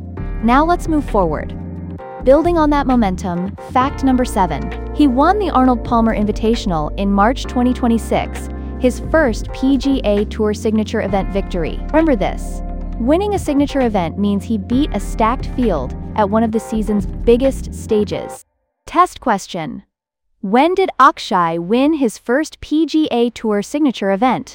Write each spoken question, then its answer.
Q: When did Akshay win his first PGA Tour signature event?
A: Correct answer, March 2026.